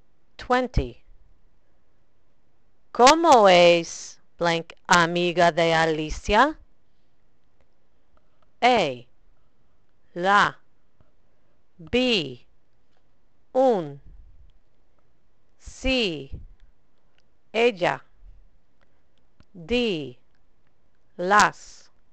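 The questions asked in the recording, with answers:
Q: ¿Cómo es blank amiga de Alicia?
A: A: la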